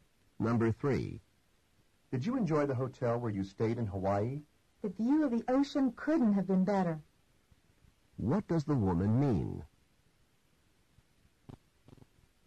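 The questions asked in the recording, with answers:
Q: What does the woman mean?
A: The ocean view was excellent.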